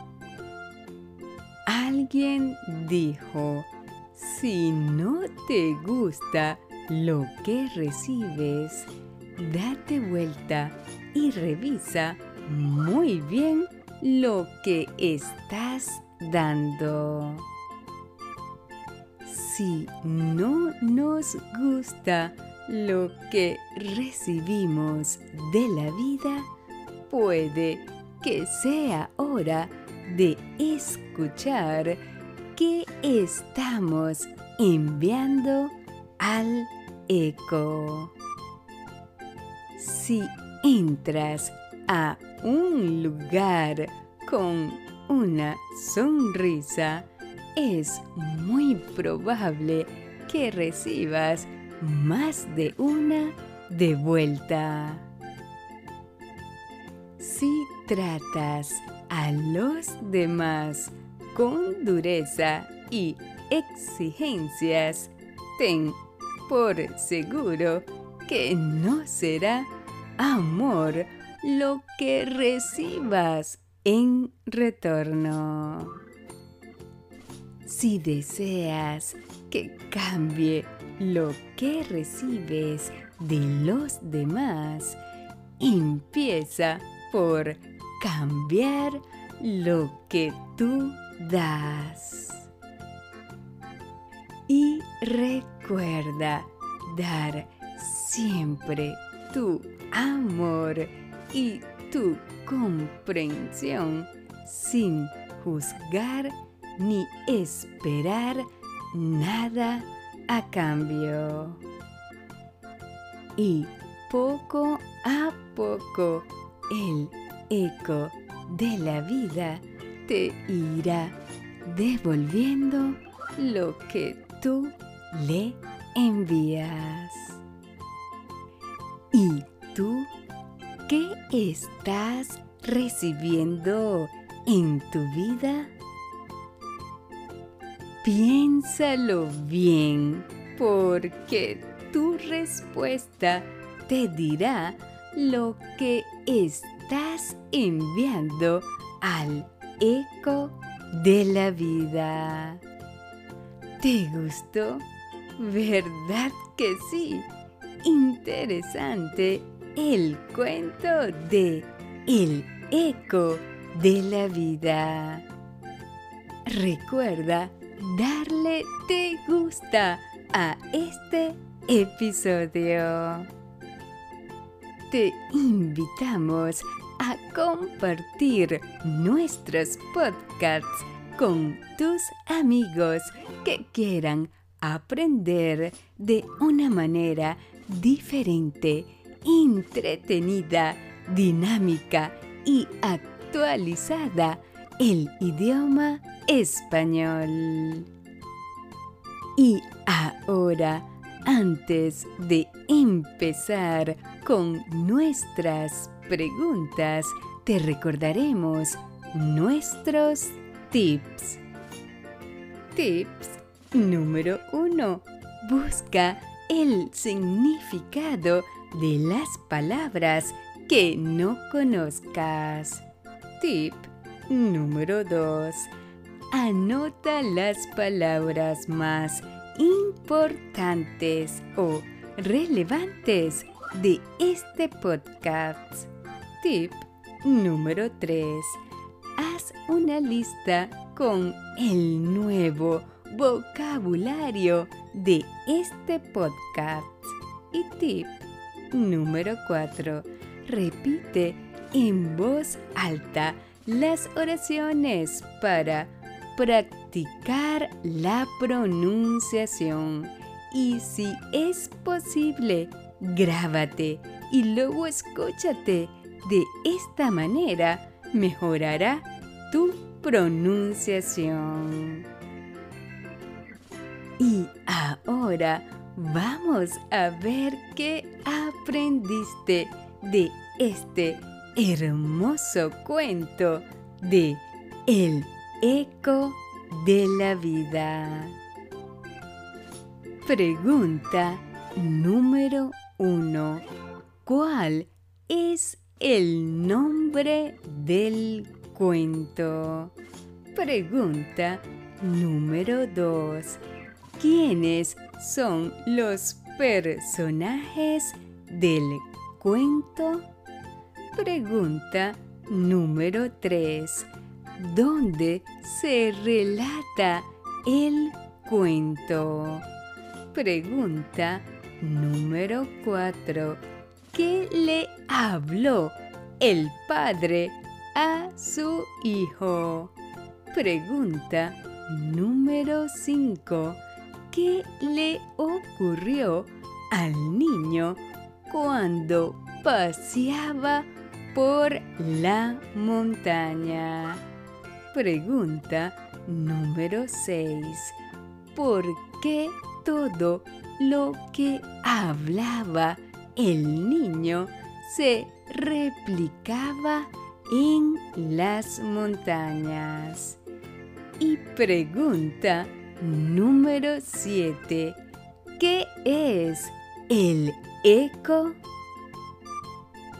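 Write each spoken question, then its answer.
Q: ¿Cuál es el nombre del cuento?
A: El eco de la vida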